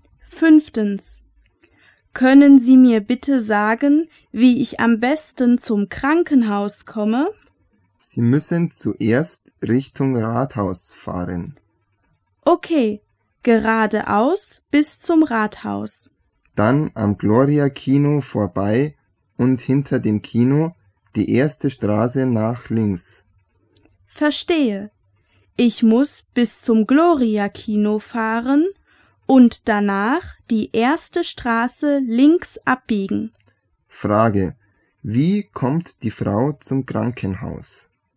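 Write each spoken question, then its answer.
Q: Wie kommt die Frau zum Krankenhaus?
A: Richtung Rathaus, am Gloria-Kino vorbei, dann die erste Straße links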